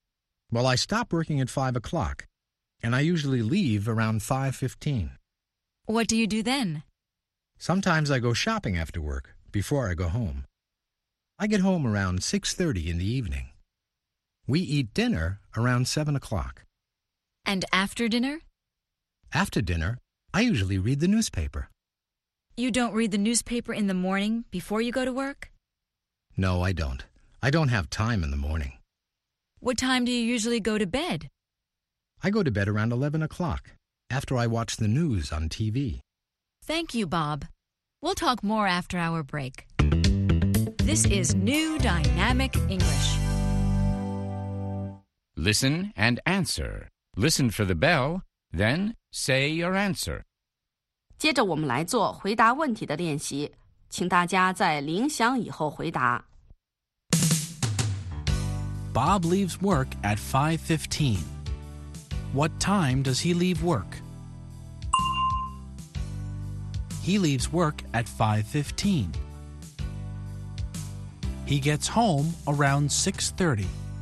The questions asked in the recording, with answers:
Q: What time does he leave work?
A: He leaves work at 5:15.